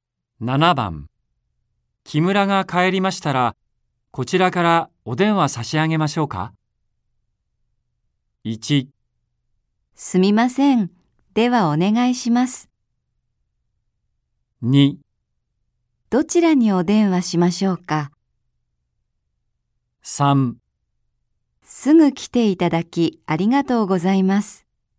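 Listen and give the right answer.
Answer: 1: すみません。ではお願いします。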